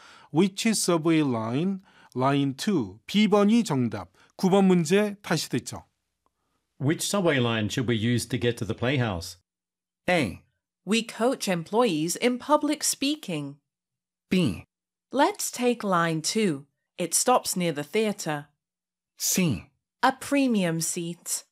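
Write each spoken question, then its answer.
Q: Which subway line should we use to get to the playhouse?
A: B: Let's take line 2. It stops near the theater.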